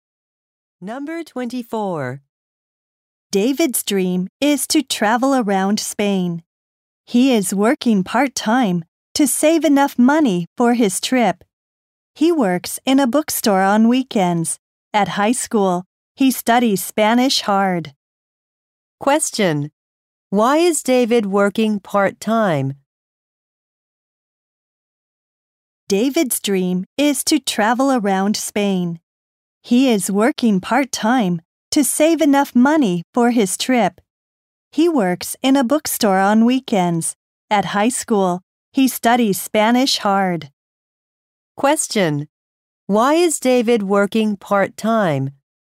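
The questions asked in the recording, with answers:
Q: Why is David working part-time?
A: To save money for his trip to Spain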